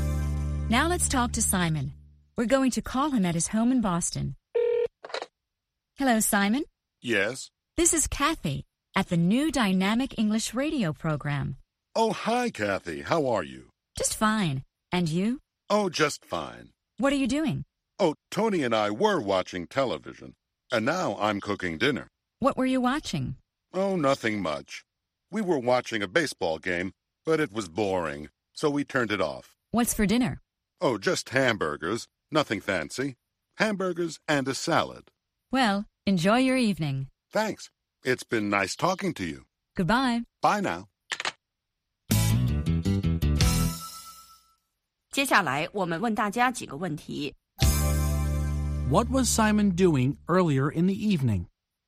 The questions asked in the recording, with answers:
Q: What was Simon doing earlier in the evening?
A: He was watching television.